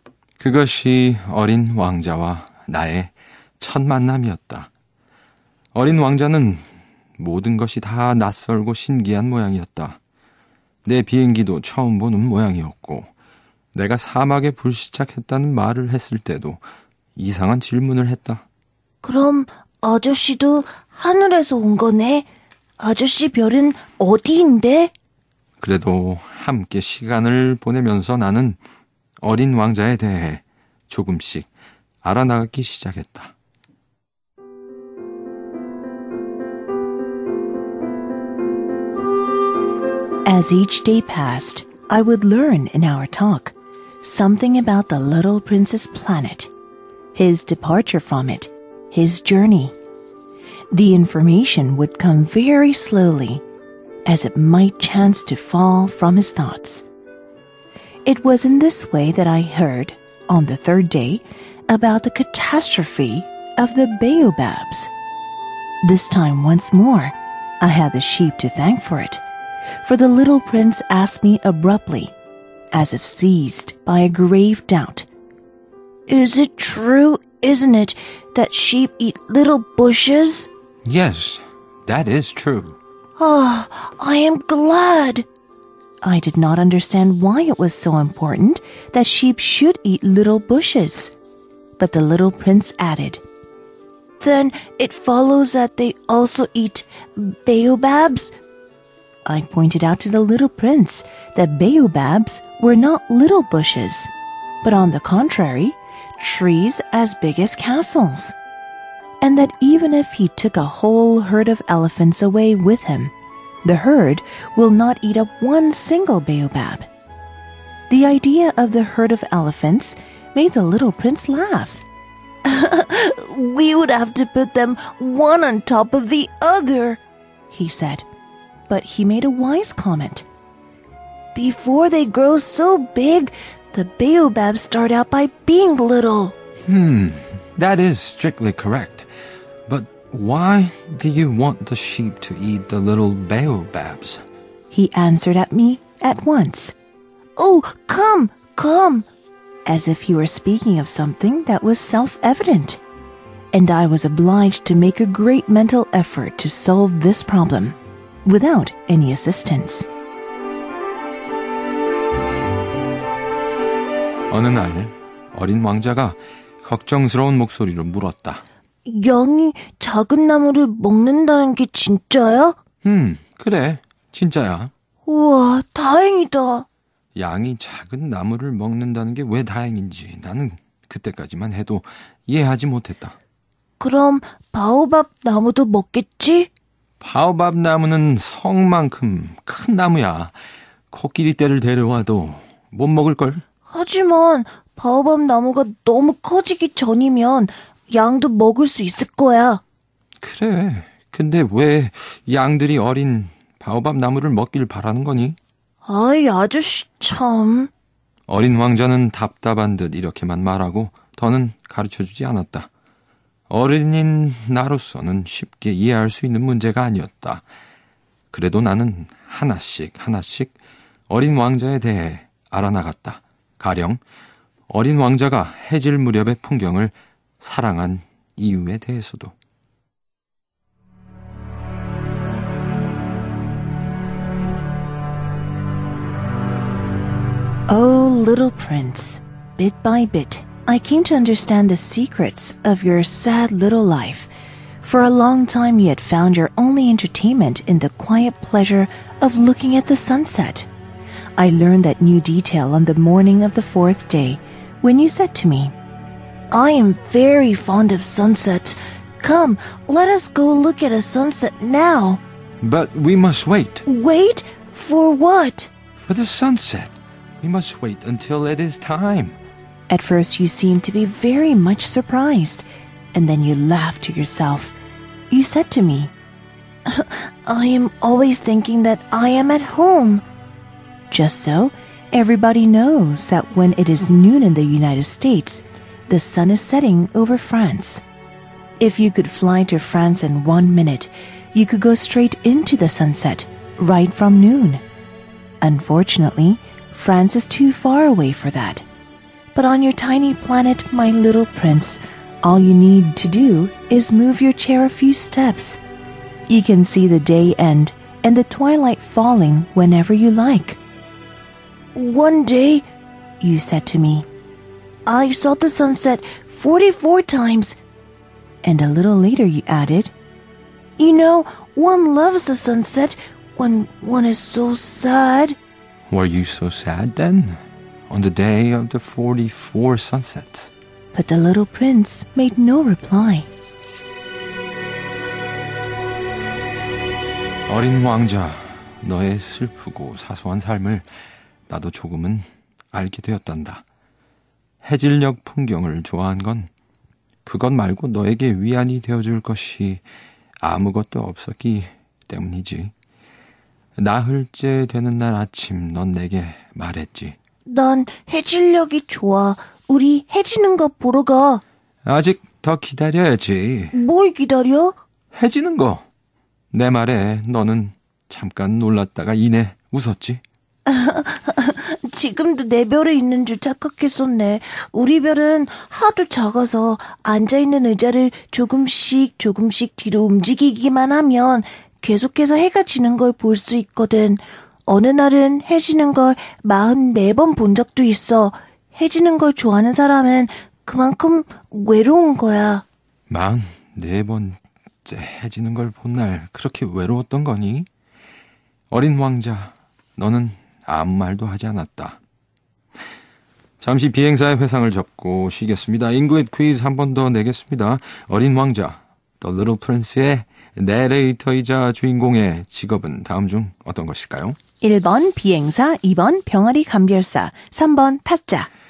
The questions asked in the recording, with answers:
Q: 어린 왕자, The Little Prince의 내레이터이자 주인공의 직업은 다음 중 어떤 것일까요?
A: 어린 왕자의 화자, 내레이터의 직업은 바로 1번 비행사였습니다.